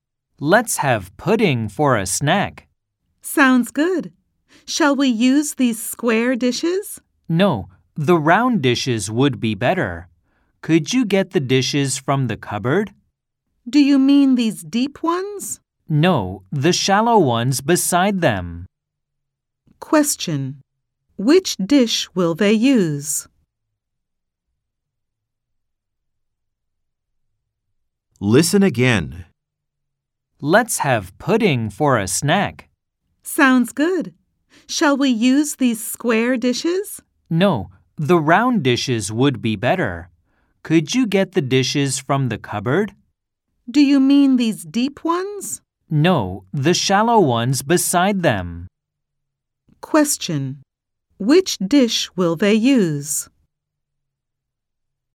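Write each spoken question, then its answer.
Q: Which dish will they use?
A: the round, shallow dish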